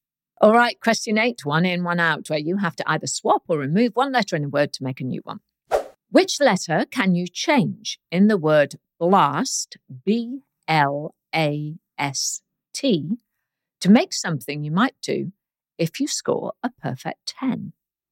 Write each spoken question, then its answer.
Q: Which letter can you change in the word blast, B-L-A-S-T, to make something you might do if you score a perfect 10?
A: Well, all you have to do is change the letter L for the letter O to get boast, B-O-A-S-T.